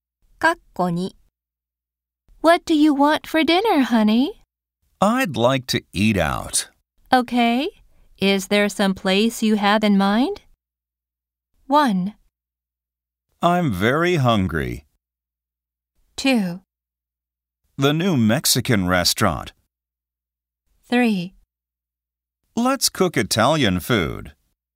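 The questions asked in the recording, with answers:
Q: Is there some place you have in mind?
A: 2: The new Mexican restaurant.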